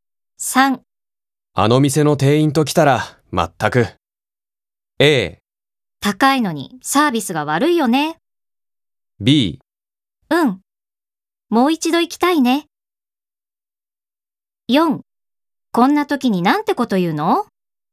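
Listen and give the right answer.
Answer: A: 高いのにサービスが悪いよね。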